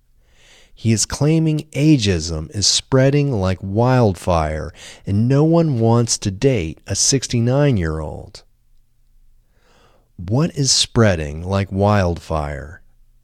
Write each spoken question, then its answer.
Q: What is spreading like wildfire?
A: Ageism is spreading like wildfire.